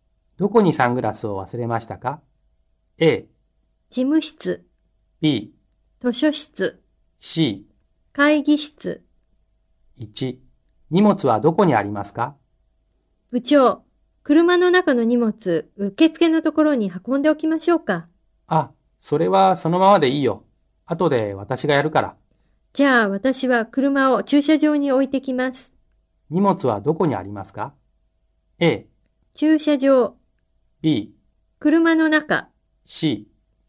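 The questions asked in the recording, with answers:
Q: 荷物はどこにありますか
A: B: 車の中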